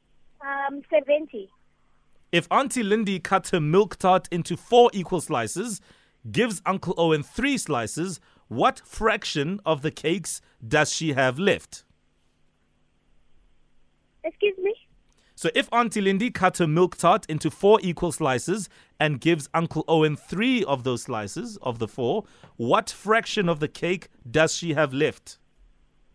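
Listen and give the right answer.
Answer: 1/4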